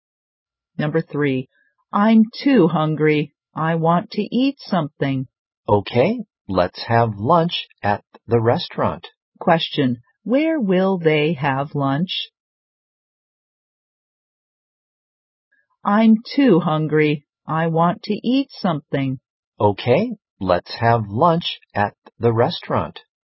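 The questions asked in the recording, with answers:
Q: Question, where will they have lunch?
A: At the restaurant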